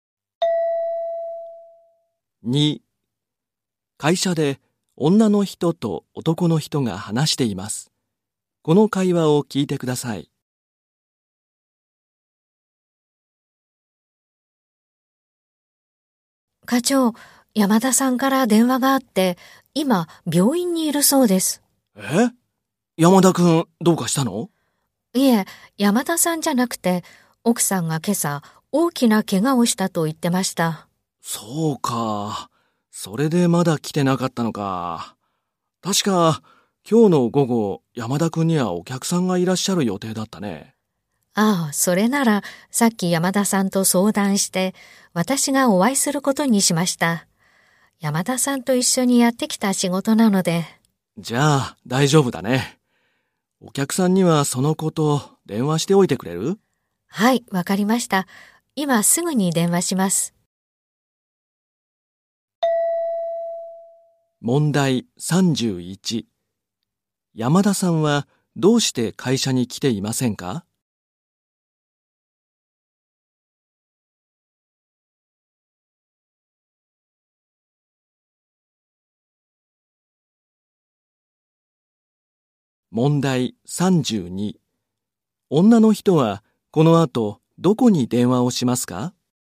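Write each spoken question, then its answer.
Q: 山田さんはどうして会社に来ていませんか?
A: 奥さんが大きな怪我をしたから

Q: 女の人はこの後どこに電話をしますか?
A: お客さん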